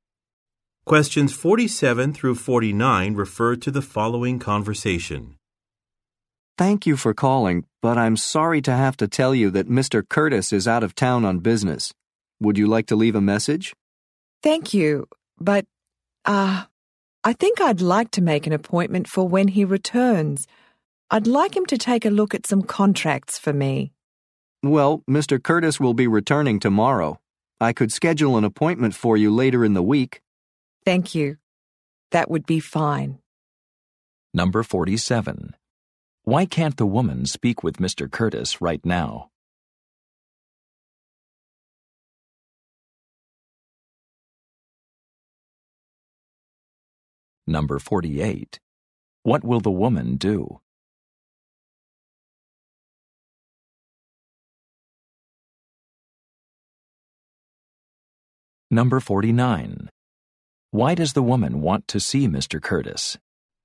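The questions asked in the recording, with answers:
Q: Why can't the woman speak with Mr. Curtis right now?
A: He is out of town on business

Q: What will the woman do?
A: Make an appointment for later in the week

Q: Why does the woman want to see Mr. Curtis?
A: To have him look at some contracts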